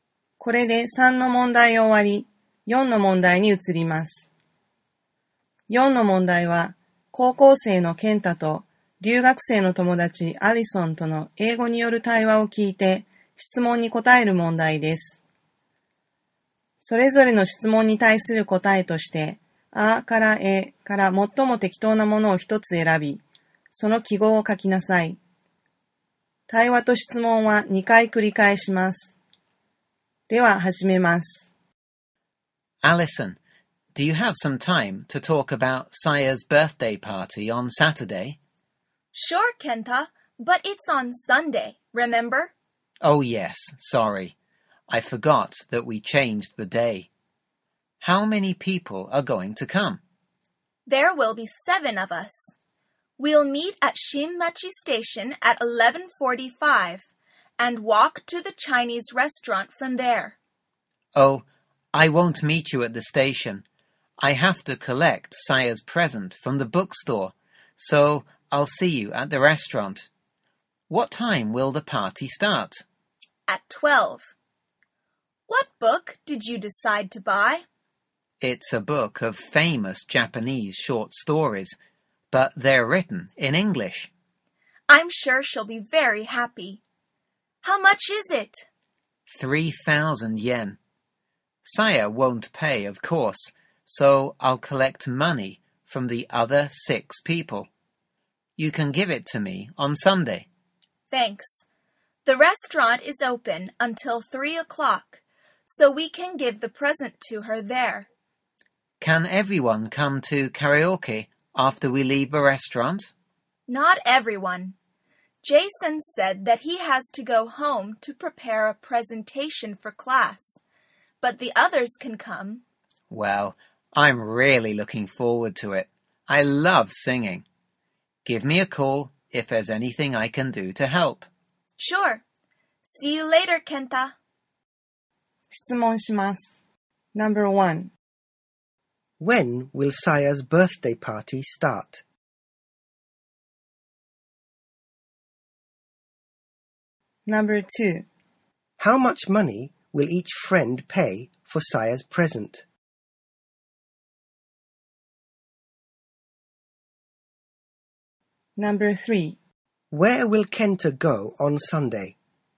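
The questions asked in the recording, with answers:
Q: When will Saya's birthday party start?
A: At 12 o'clock on Sunday

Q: How much money will each friend pay for Saya's present?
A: 500 yen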